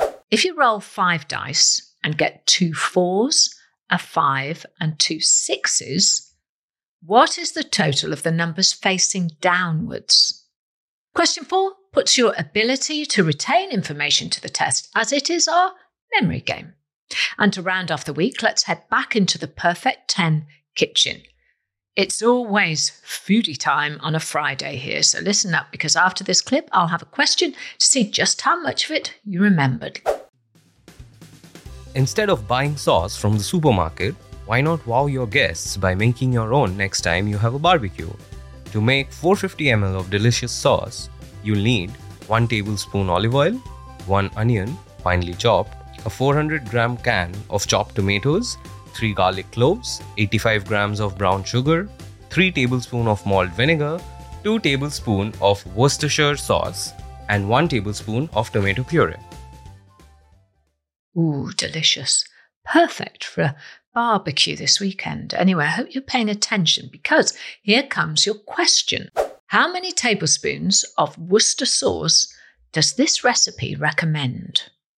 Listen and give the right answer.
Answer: 2 tablespoons